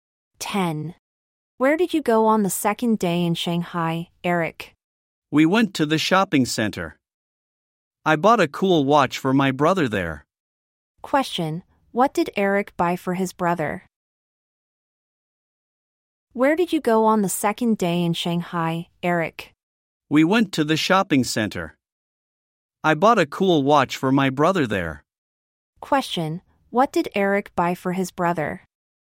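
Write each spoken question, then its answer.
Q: Question, what did Eric buy for his brother?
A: A cool watch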